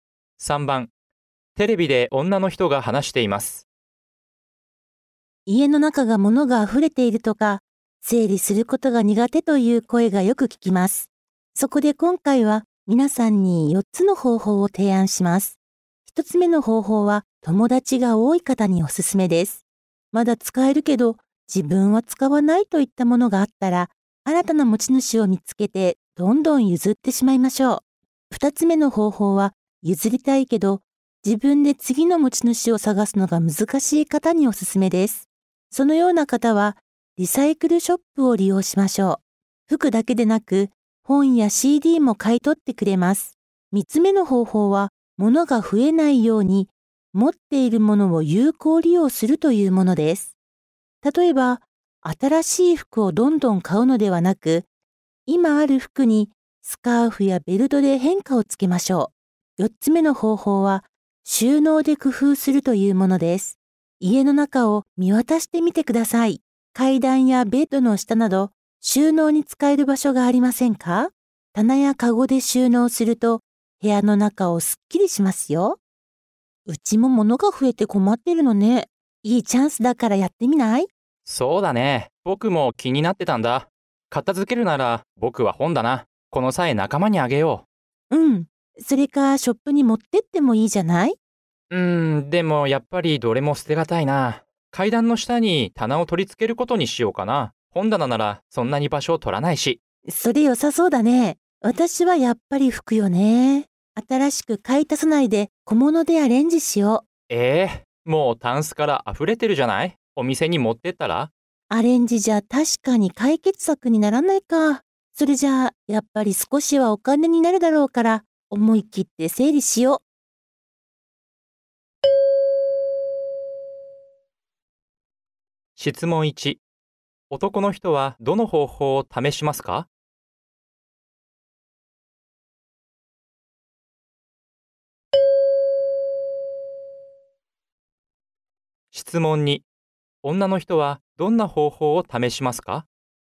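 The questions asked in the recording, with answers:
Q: 男の人はどの方法を試しますか?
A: 4つ目の方法:収納を工夫する(階段の下に棚を取り付ける)

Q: 女の人はどんな方法を試しますか?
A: 2つ目の方法:リサイクルショップに服を持っていく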